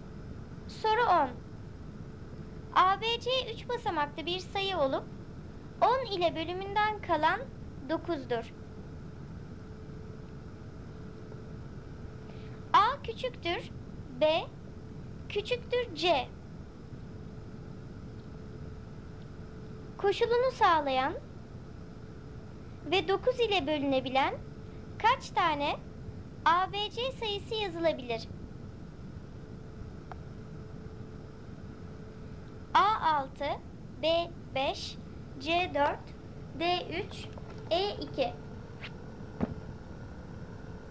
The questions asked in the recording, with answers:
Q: Koşulunu sağlayan ve 9 ile bölünebilen kaç tane ABC sayısı yazılabilir?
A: Doğru cevap C 4.